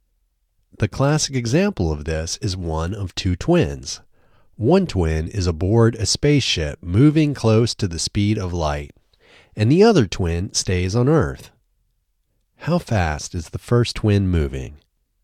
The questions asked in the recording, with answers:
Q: How fast is the first twin moving?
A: The first twin is moving close to the speed of light.